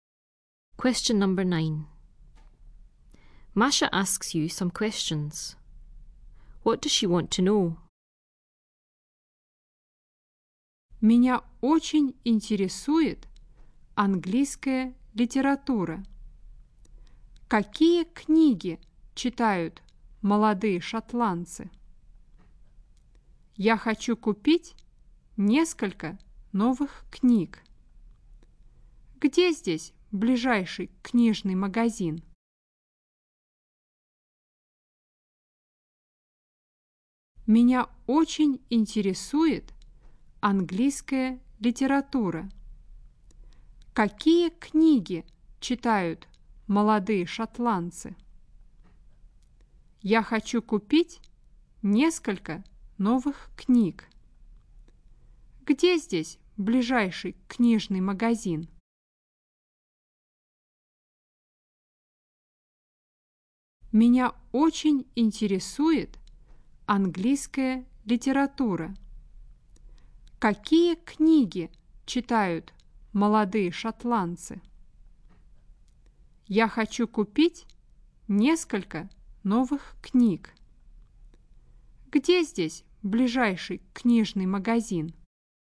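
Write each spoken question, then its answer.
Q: What does she want to know?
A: What books young Scots read, and where the nearest bookshop is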